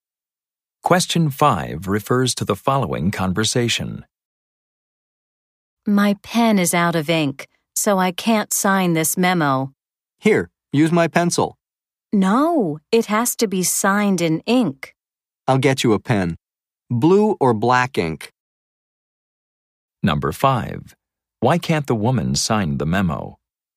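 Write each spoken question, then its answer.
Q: Why can't the woman sign the memo?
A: Her pen is out of ink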